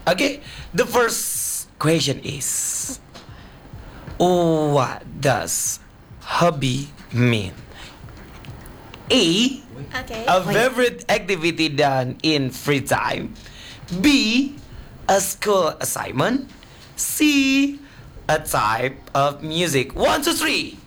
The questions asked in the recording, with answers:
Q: what does hobby mean?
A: A. A favorite activity done in free time.